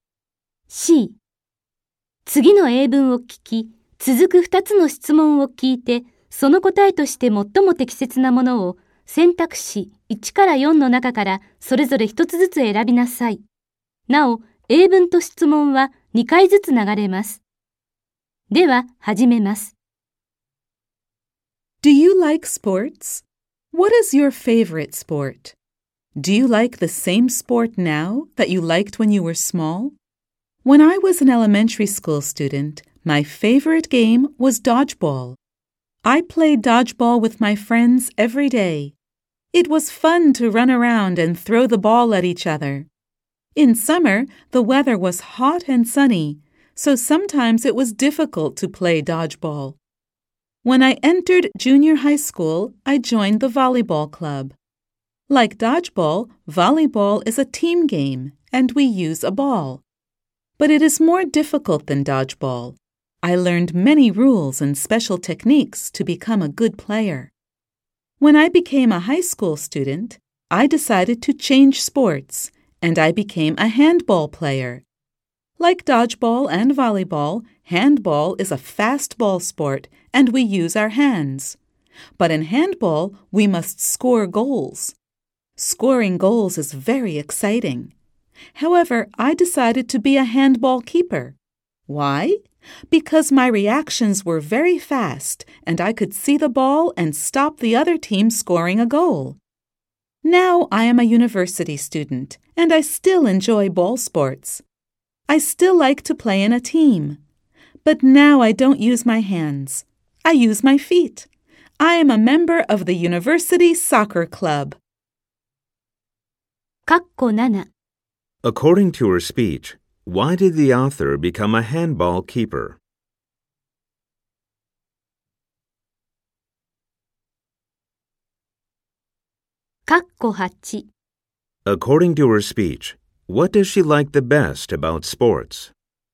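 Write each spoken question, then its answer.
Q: According to her speech, why did the author become a handball keeper?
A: Because her reactions were very fast and she could see the ball and stop goals.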